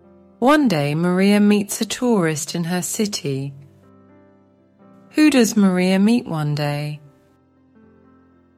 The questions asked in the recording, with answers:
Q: Who does Maria meet one day?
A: She meets a tourist in her city.